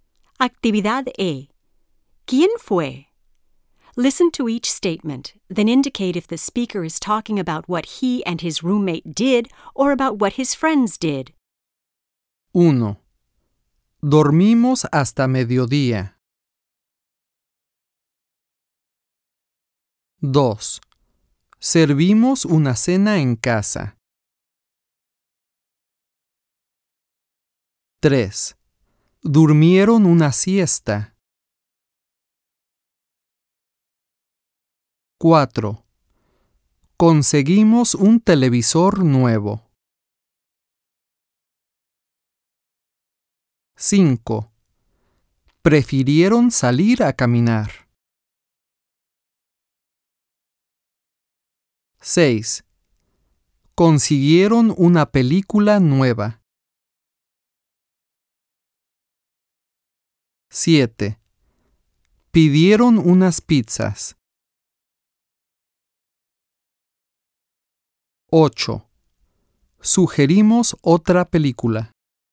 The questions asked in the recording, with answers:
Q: Dormimos hasta mediodía.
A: Mi compañero y yo.

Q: Servimos una cena en casa.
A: Mi compañero y yo.

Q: Durmieron una siesta.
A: Mis amigos.

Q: Conseguimos un televisor nuevo.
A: Mi compañero y yo.

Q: Prefirieron salir a caminar.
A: Mis amigos.

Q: Consiguieron una película nueva.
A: Mis amigos.

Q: Pidieron unas pizzas.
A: Mis amigos.

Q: Sugerimos otra película.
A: Mi compañero y yo.